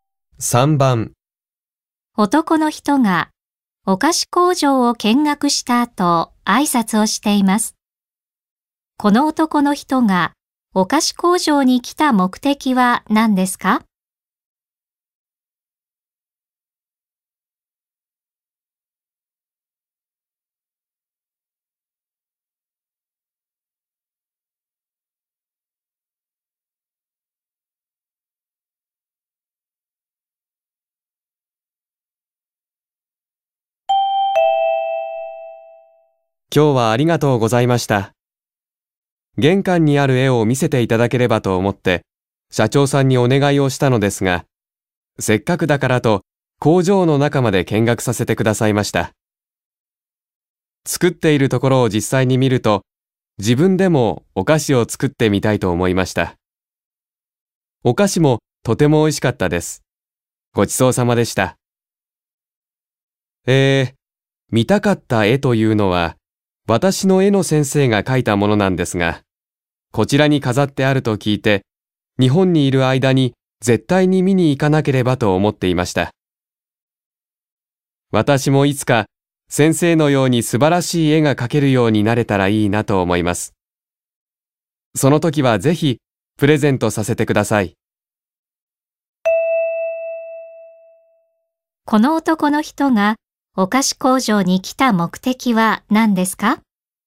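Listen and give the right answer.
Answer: 先生が描いた絵を見るため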